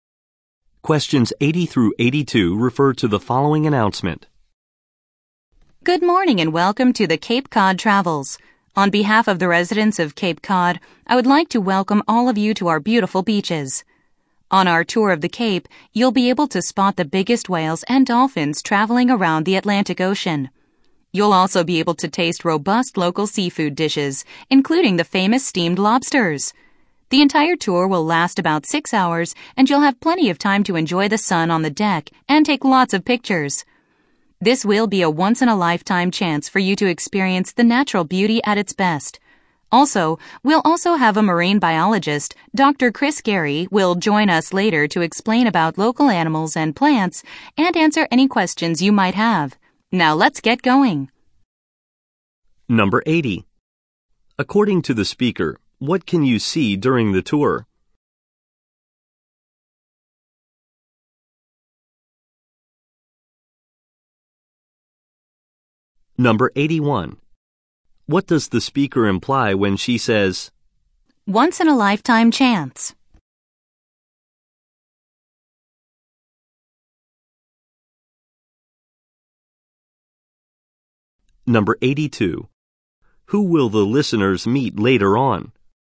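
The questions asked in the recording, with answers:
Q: According to the speaker, what can you see during the tour?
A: Whales and dolphins

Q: Who will the listeners meet later on?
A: A marine biologist, Dr. Chris Gary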